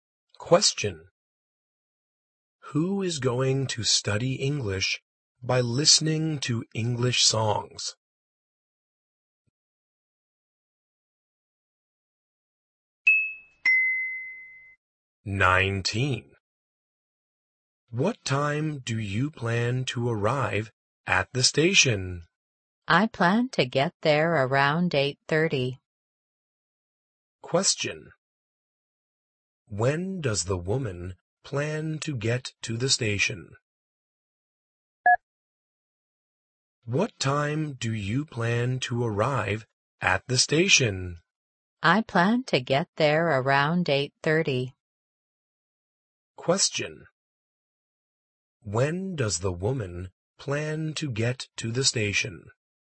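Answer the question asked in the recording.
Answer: Around 8:30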